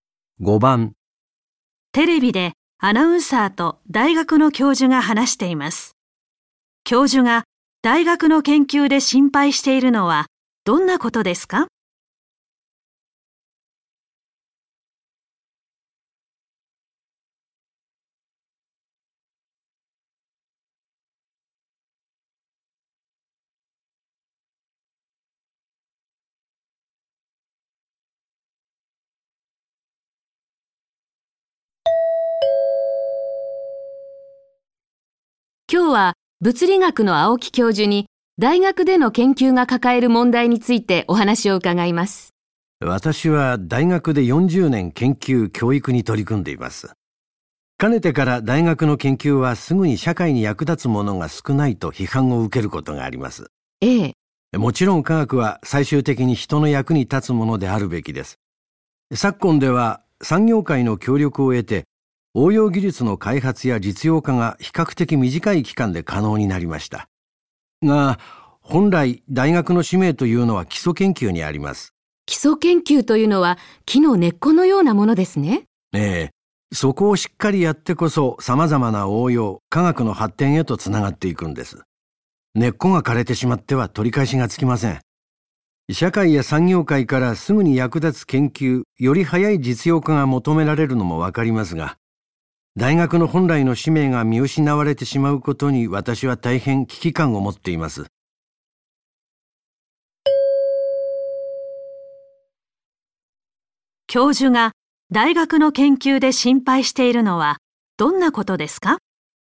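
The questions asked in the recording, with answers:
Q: 教授が大学の研究で心配しているのはどんなことですか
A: 基礎研究という大学の本来の使命が見失われること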